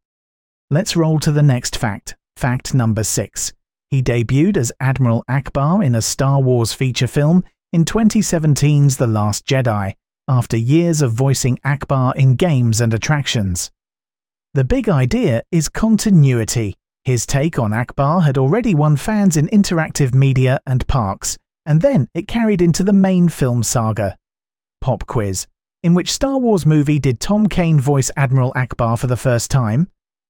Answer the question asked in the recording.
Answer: Correct answer. The Last Jedi.